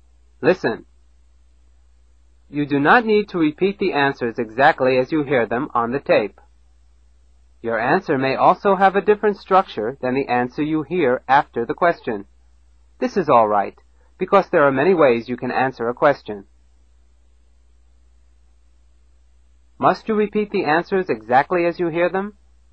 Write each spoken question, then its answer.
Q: Must you repeat the answers exactly as you hear them?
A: No.